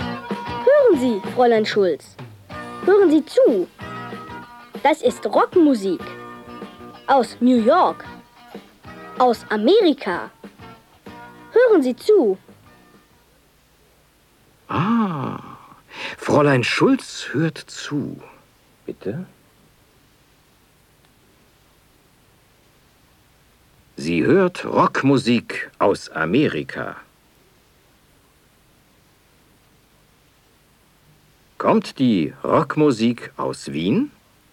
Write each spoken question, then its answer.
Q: Kommt die Rockmusik aus Wien?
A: Nein, sie kommt nicht aus Wien.